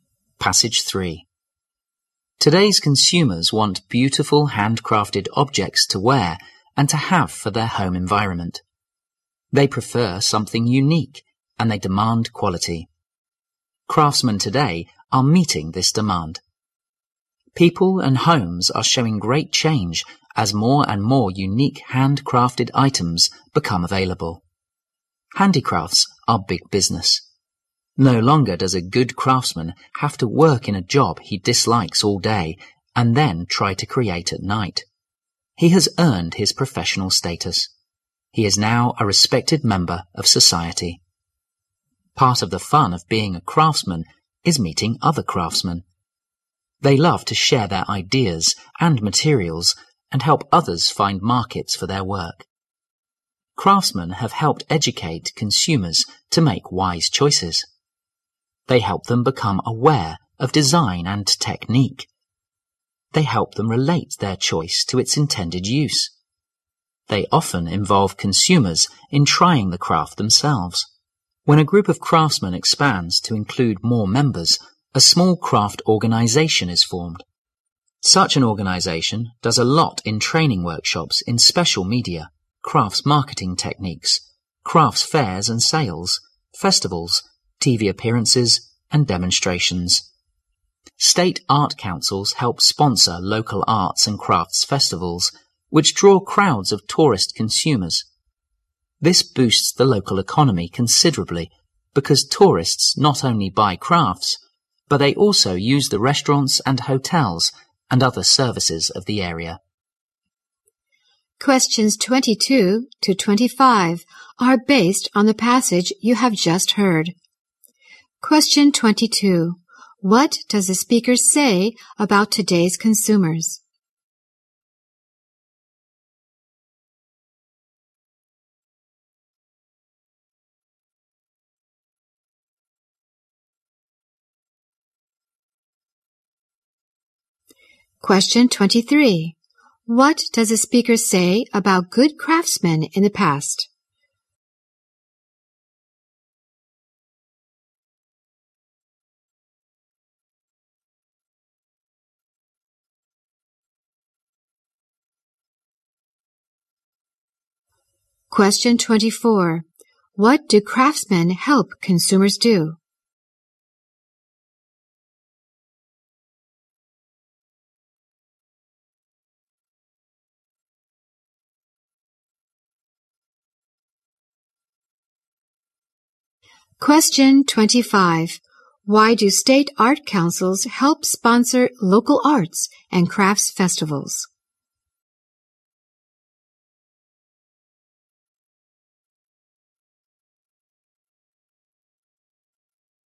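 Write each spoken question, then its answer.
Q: What does the speaker say about today's consumers?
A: They want unique, quality handcrafted items

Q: What does the speaker say about good craftsmen in the past?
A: They worked in jobs they disliked and created at night

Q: What do craftsmen help consumers do?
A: Make wise choices

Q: Why do state art councils help sponsor local arts and crafts festivals?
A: To boost the local economy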